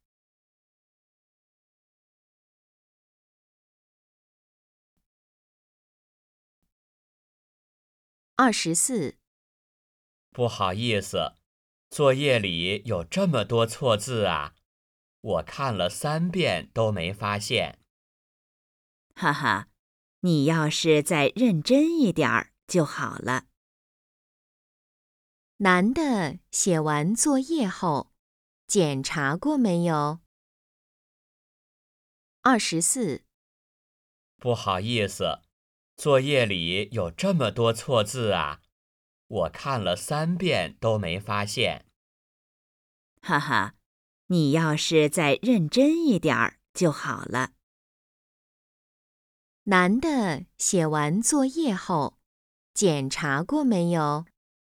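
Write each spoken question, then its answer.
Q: 男的写完作业后,检查过没有?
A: 检查过,看了三遍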